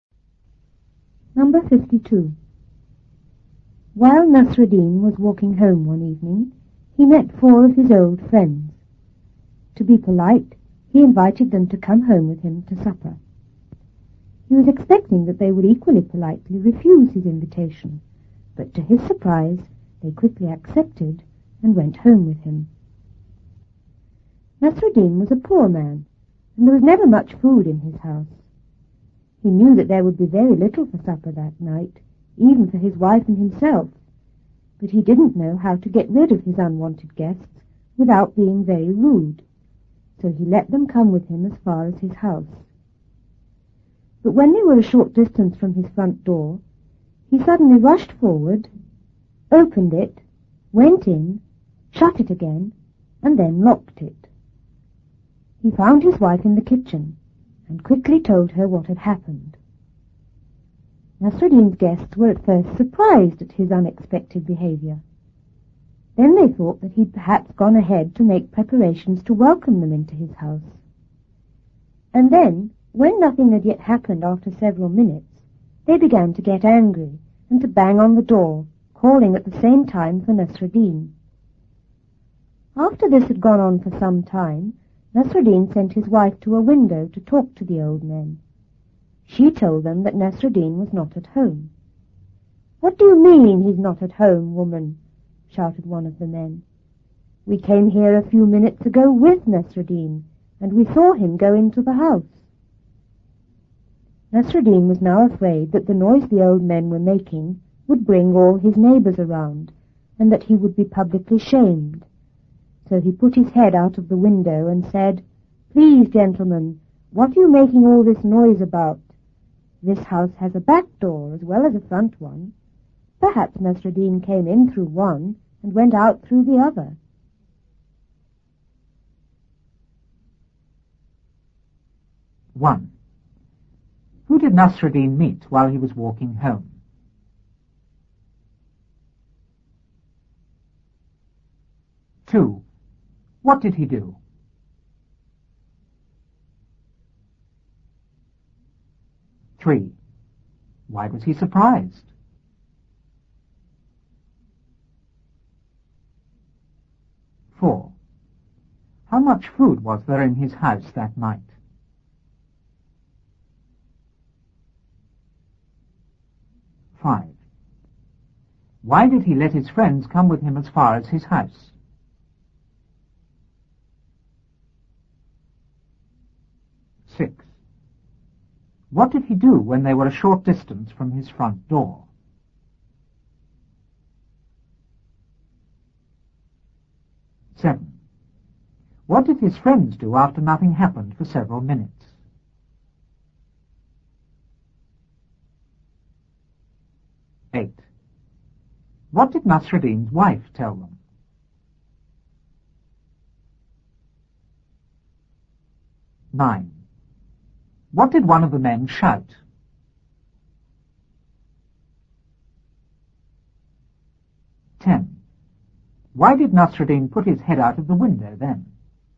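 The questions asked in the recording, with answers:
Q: Who did Nasruddin meet while he was walking home?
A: Four of his old friends

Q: What did he do?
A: He invited them to come home with him to supper

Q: Why was he surprised?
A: They quickly accepted his invitation instead of refusing

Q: How much food was there in his house that night?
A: Very little, not even enough for him and his wife

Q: Why did he let his friends come with him as far as his house?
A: He didn't know how to get rid of them without being very rude

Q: What did he do when they were a short distance from his front door?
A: He rushed forward, went in, shut the door and locked it

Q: What did his friends do after nothing happened for several minutes?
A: They got angry, banged on the door and called for Nasruddin

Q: What did Nasruddin's wife tell them?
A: That Nasruddin was not at home

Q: What did one of the men shout?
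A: "What do you mean he's not at home? We came here with him and saw him go into the house."

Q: Why did Nasruddin put his head out of the window then?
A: He was afraid the noise would bring his neighbours around and he would be publicly shamed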